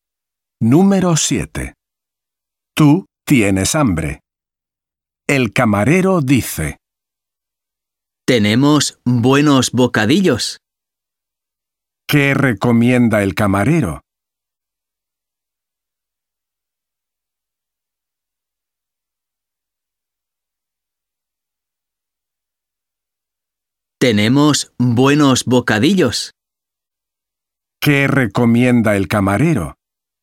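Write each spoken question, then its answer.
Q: ¿Qué recomienda el camarero?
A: bocadillos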